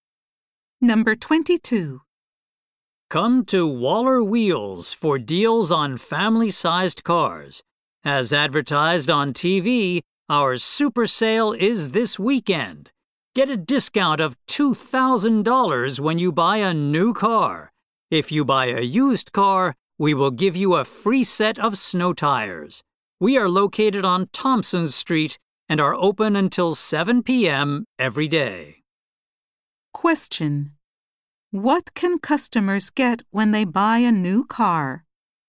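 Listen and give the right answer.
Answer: A $2,000 discount.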